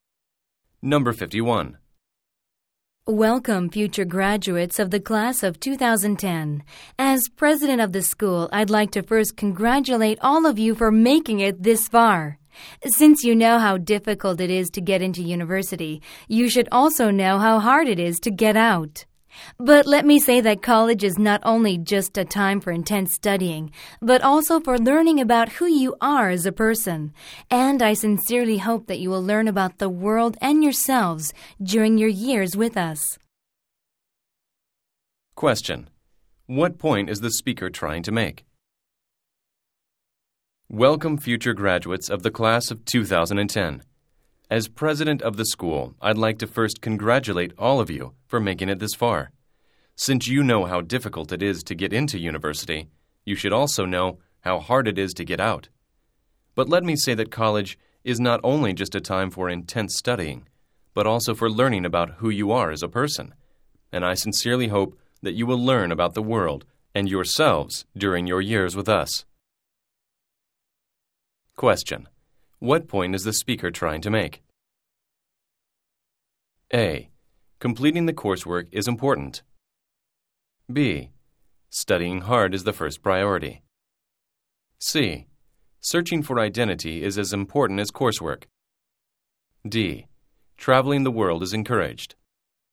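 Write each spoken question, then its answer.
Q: What point is the speaker trying to make?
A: C: Searching for identity is as important as coursework.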